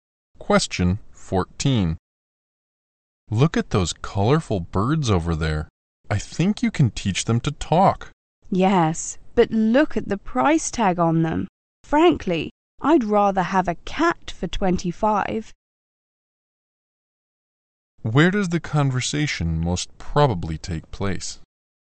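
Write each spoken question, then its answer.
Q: Where does the conversation most probably take place?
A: In a pet shop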